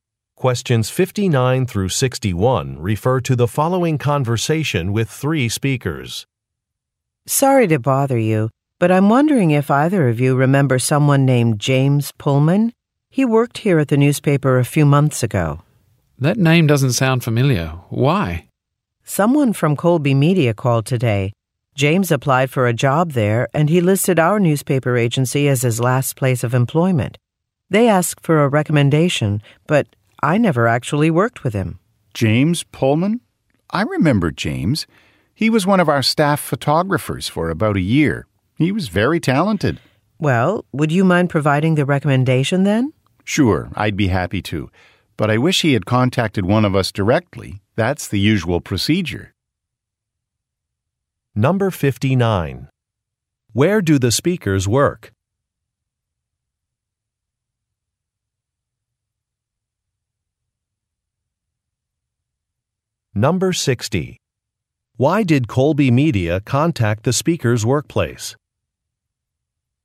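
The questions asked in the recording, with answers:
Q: Where do the speakers work?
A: At a newspaper

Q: Why did Colby Media contact the speakers' workplace?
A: To ask for a recommendation for James Pullman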